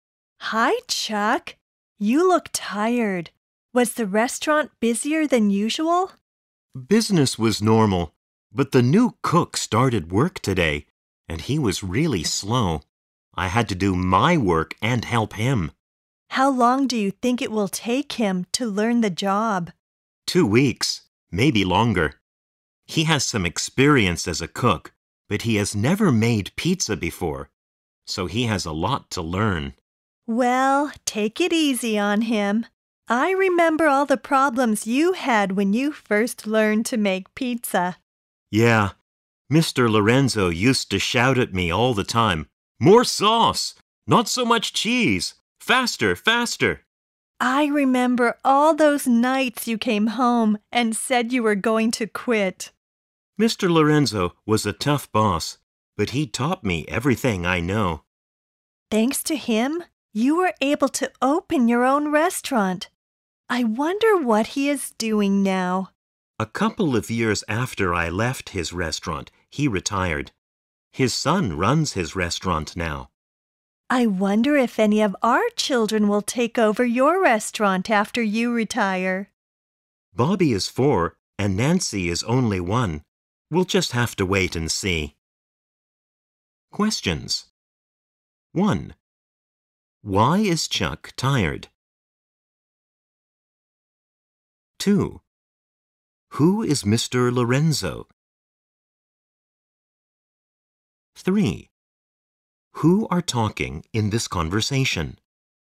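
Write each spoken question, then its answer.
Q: Why is Chuck tired?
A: He had to do his work and help the slow new cook.

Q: Who is Mr. Lorenzo?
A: Chuck's former boss, who taught him to make pizza.

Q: Who are talking in this conversation?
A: A husband and wife (Chuck, a restaurant owner, and his wife).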